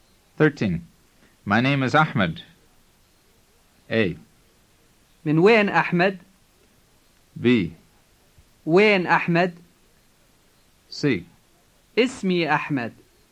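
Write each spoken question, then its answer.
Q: My name is Ahmed.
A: C: اسمي أحمد.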